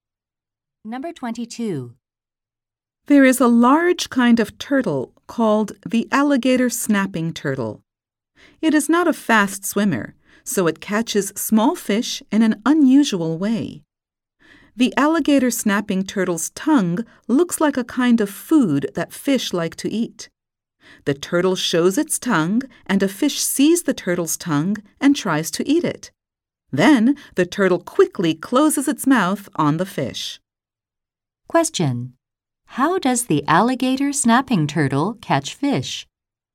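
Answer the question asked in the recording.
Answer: It uses its tongue, which looks like food, to lure fish.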